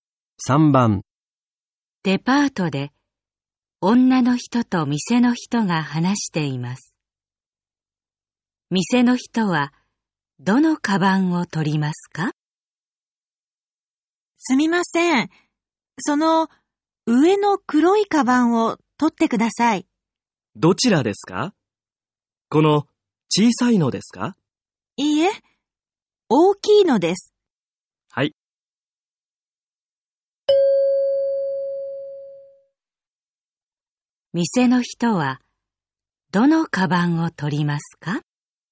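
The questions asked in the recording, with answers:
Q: 店の人はどのカバンを取りますか?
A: 上の黒い大きいカバン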